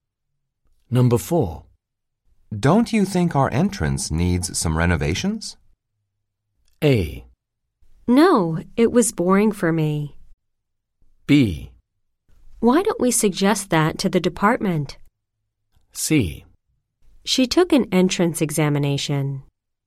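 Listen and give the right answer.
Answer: B: Why don't we suggest that to the department?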